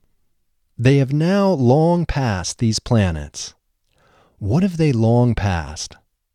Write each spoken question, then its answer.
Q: What have they long passed?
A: They have long passed these planets.